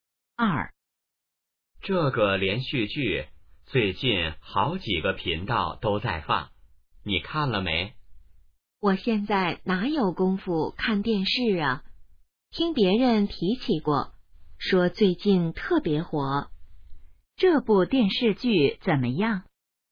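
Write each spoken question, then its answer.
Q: 这部电视剧怎么样?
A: 最近特别火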